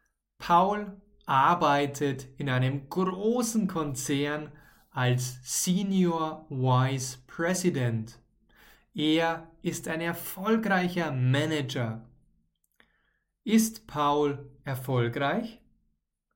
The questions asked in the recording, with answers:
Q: Ist Paul erfolgreich?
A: Ja, er ist erfolgreich. Paul ist erfolgreich.